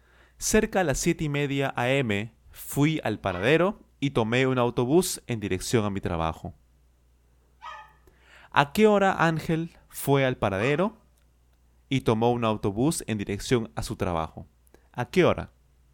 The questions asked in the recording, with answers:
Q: ¿A qué hora Ángel fue al paradero y tomó un autobús en dirección a su trabajo?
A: cerca a las siete y media.